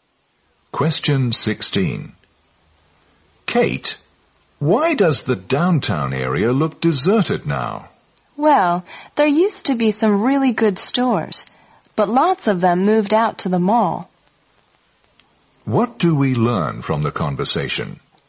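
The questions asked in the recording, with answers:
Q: What do we learn from the conversation?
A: Many downtown stores have moved out to the mall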